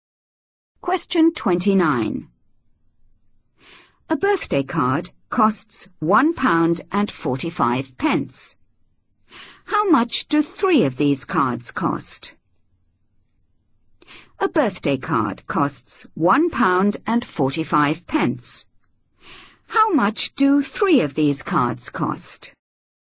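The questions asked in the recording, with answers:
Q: How much do 3 of these cards cost?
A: £4.35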